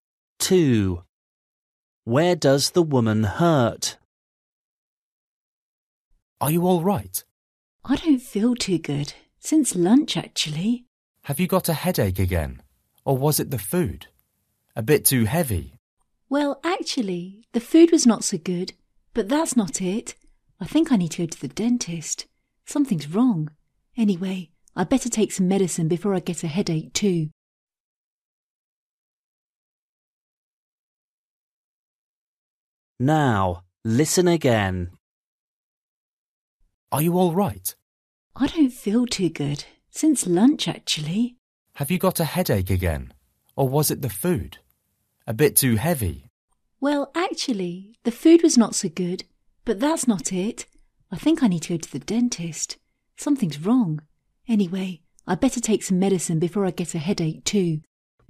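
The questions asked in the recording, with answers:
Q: Where does the woman hurt?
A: her tooth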